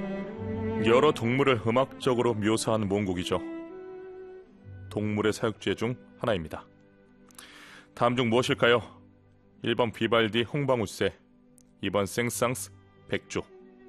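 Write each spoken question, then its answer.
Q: 다음 중 무엇일까요?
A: 2번: 생상스 백조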